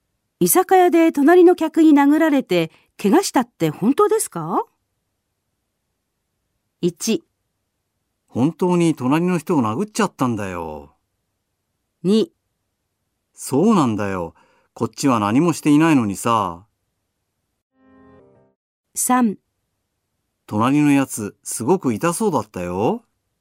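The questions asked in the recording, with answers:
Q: 居酒屋で隣の客に殴られて怪我したって本当ですか?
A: 2: そうなんだよ。こっちは何もしていないのにさ。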